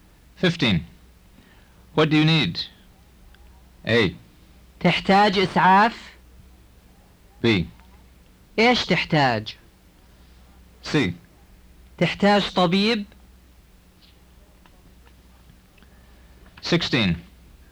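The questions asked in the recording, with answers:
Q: What do you need?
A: B: إيش تحتاج؟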